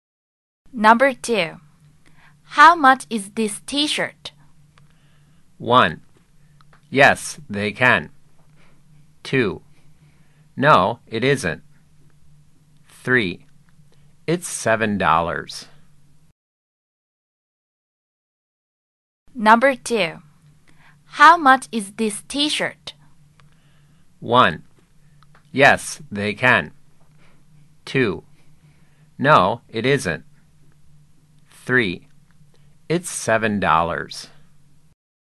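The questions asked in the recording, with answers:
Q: How much is this t-shirt?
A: 3: It's $7.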